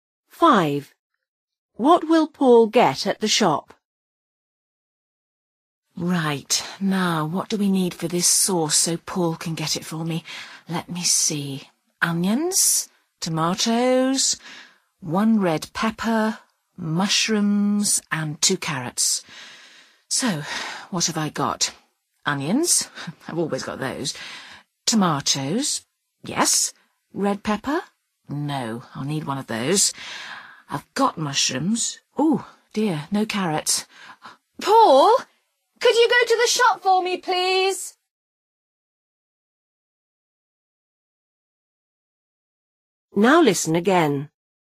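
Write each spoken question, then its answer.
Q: What will Paul get at the shop?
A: A red pepper and carrots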